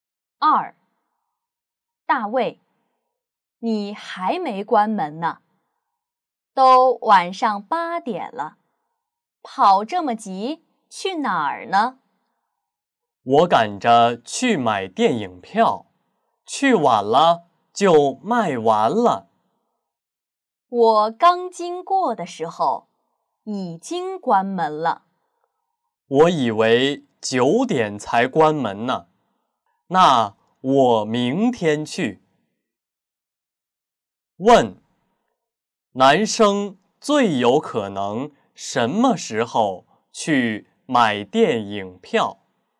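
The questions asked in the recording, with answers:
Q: 男生最有可能什么时候去买电影票?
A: 明天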